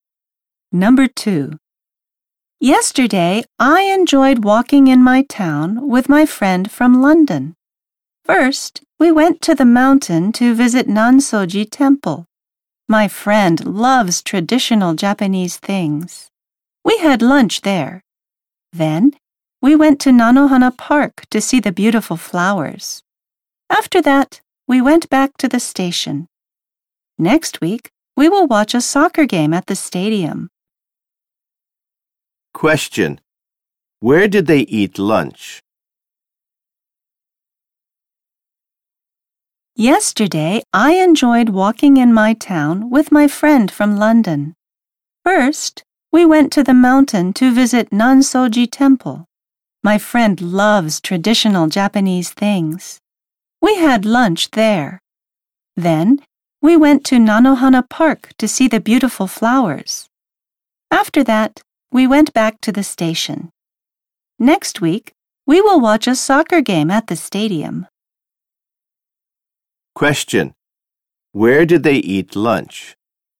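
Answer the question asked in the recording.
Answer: At Nansoji Temple.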